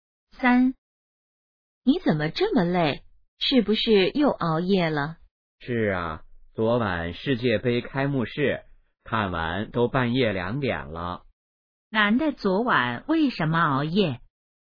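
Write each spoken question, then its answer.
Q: 男的昨晚为什么熬夜?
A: 看世界杯开幕式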